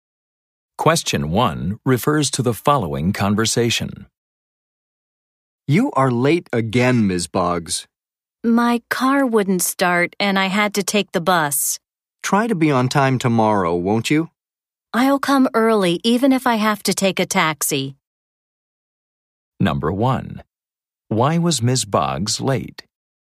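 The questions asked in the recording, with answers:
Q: Why was Ms. Boggs late?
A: Her car wouldn't start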